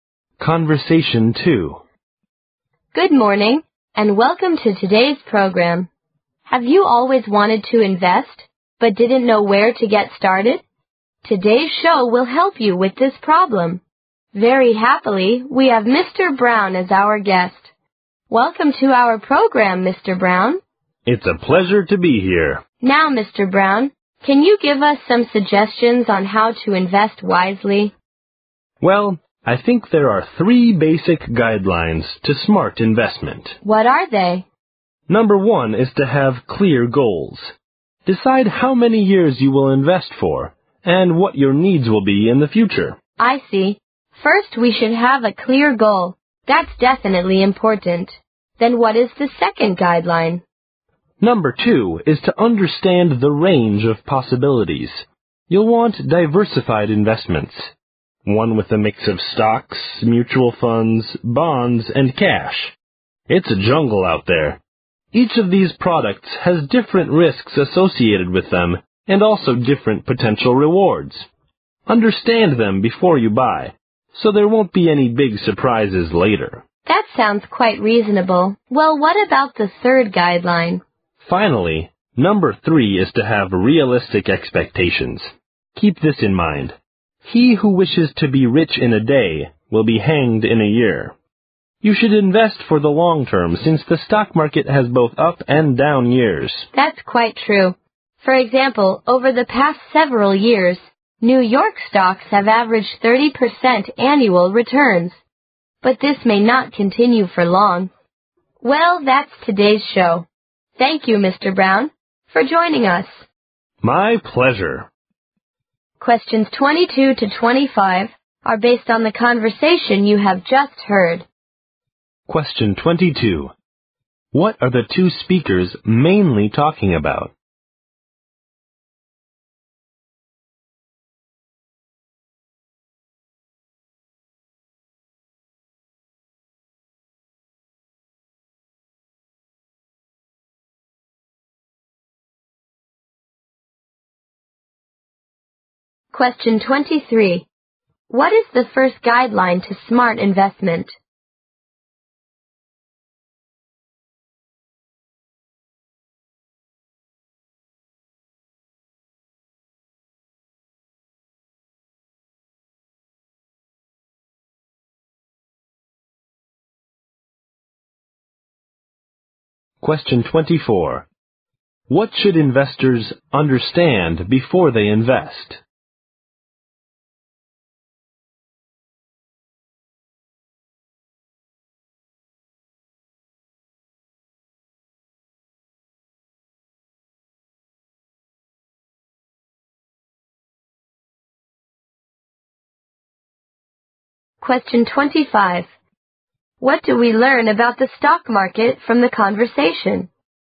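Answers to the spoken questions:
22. How to invest wisely
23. Having clear goals
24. The different risks and rewards of each investment product
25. It has both up and down years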